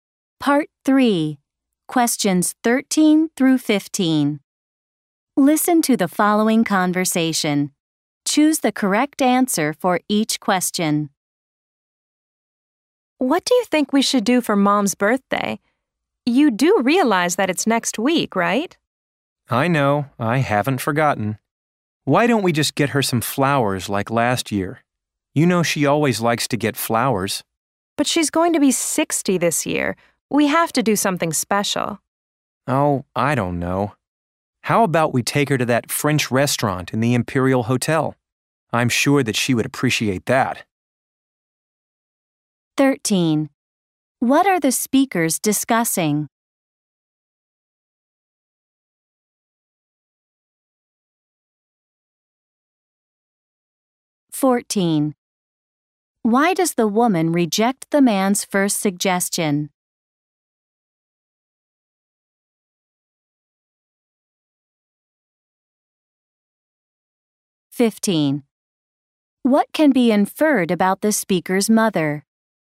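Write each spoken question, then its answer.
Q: What are the speakers discussing?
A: What to do for their mom's birthday

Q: Why does the woman reject the man's first suggestion?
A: Their mom is turning 60, so they should do something special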